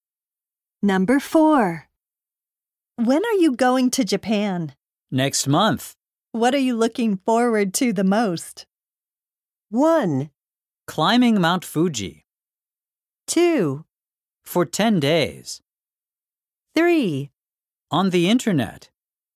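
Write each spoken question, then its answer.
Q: What are you looking forward to the most?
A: 1: Climbing Mount Fuji.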